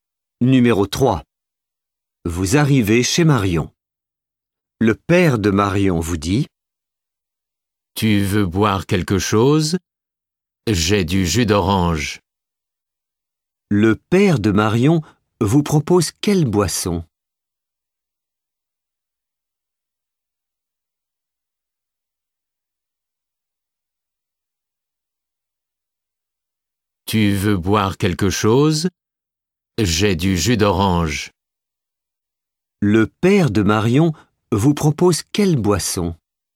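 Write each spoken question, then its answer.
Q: Le père de Marion vous propose quelle boisson ?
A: Du jus d'orange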